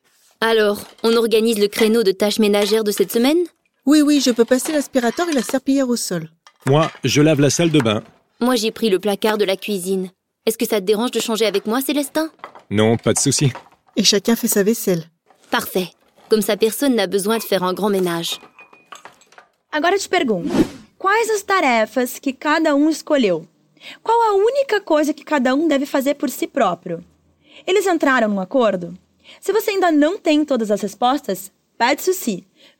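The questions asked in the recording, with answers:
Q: Qual a única coisa que cada deve fazer por si próprio?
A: E cada um lava sua louça.

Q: Eles entraram num acordo?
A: Sim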